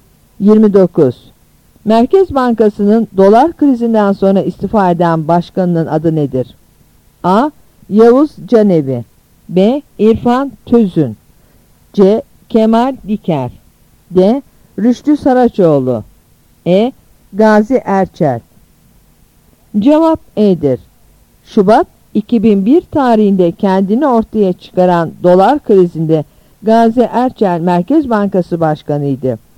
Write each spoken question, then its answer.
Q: Merkez Bankası'nın dolar krizinden sonra istifa eden başkanının adı nedir?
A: Cevap E'dir.